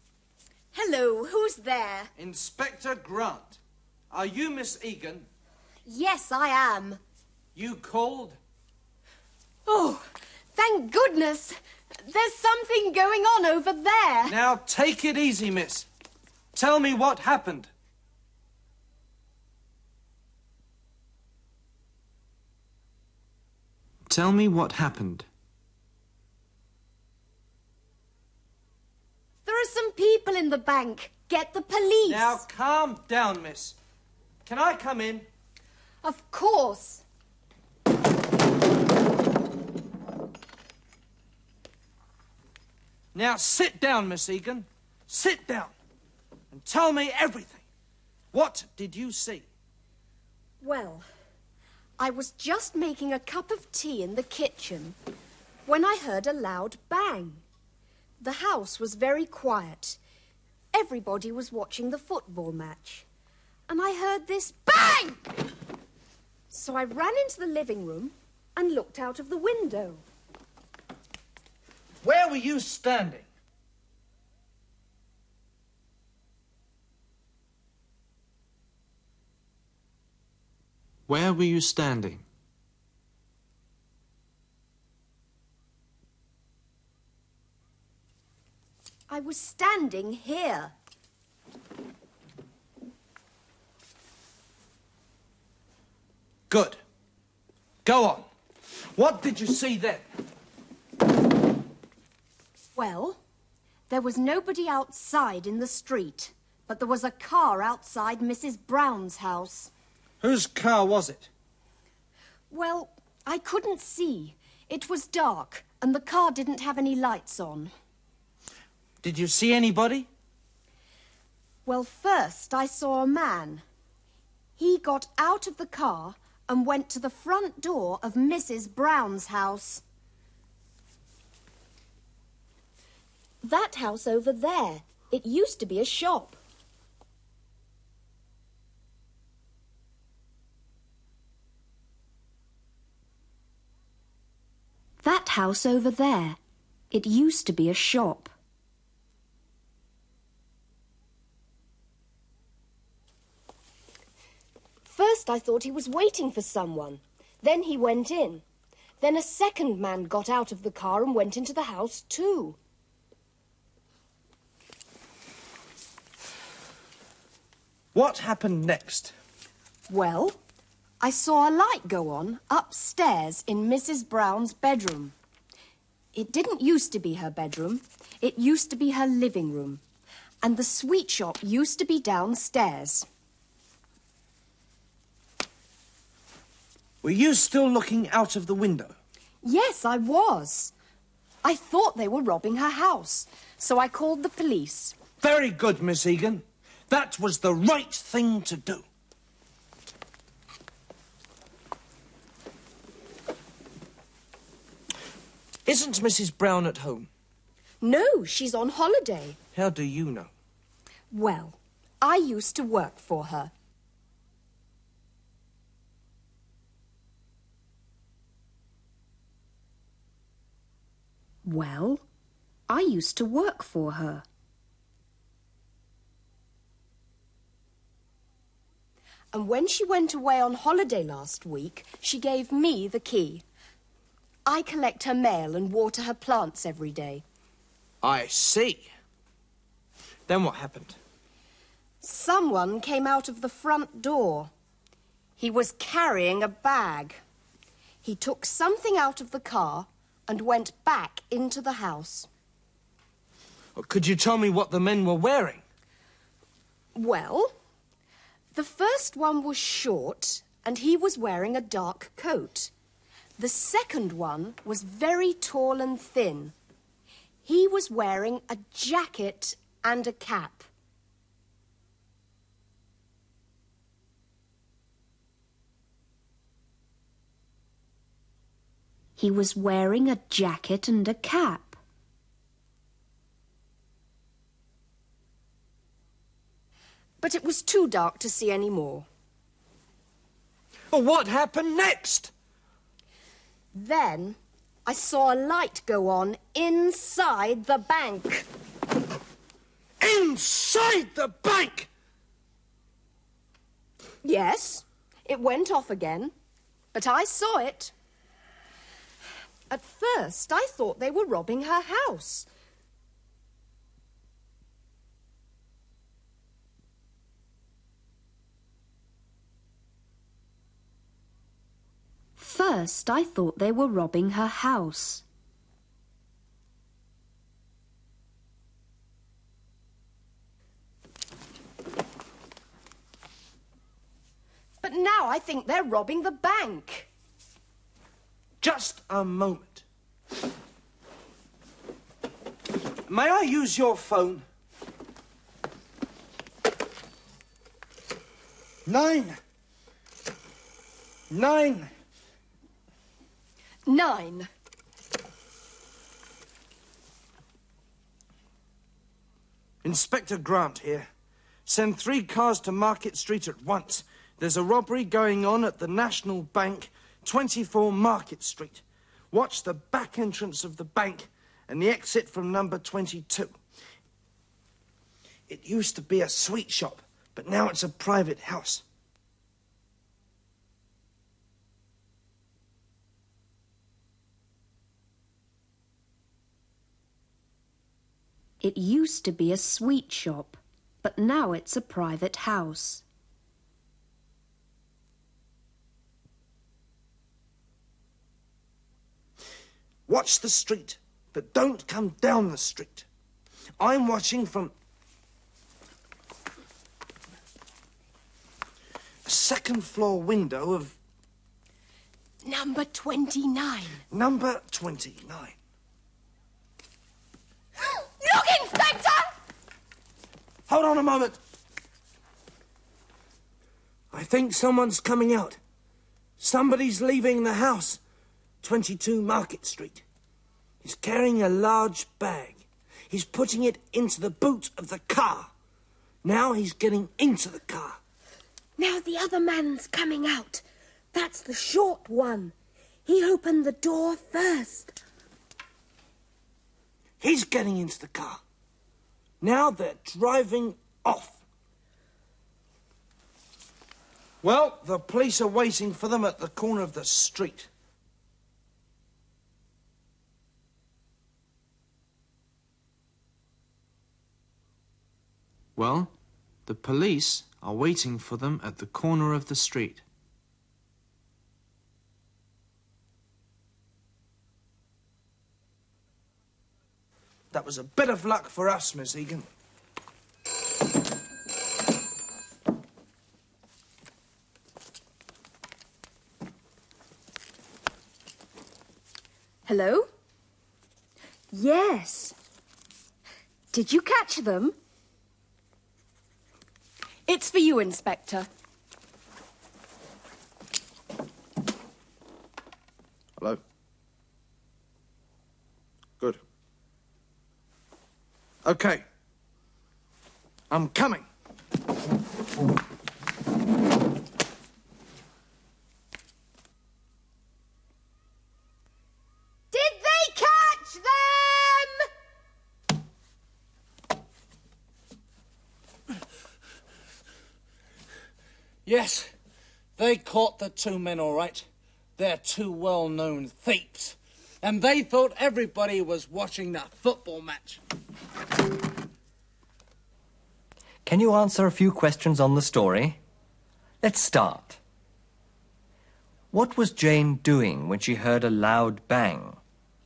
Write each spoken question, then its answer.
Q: What was Jane doing when she heard a loud bang?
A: She was making a cup of tea.